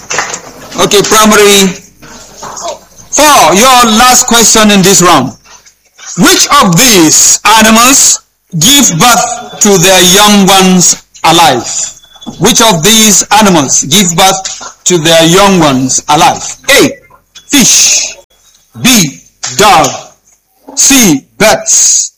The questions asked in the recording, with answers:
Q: Which of these animals give birth to their young ones alive?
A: B. Dog.